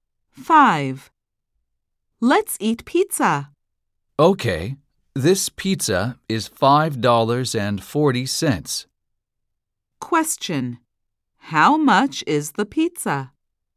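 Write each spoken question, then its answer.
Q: How much is the pizza?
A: $5.40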